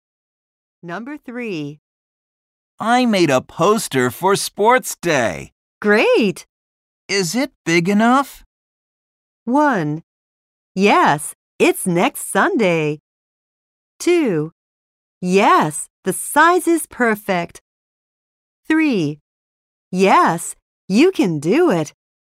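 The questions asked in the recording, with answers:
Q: Is it big enough?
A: 2: Yes, the size is perfect.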